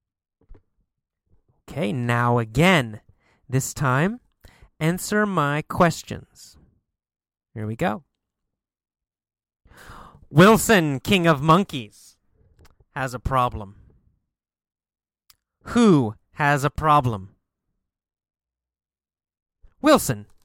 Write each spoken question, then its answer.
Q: Who has a problem?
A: Wilson. Wilson, the king of the monkeys, has a problem.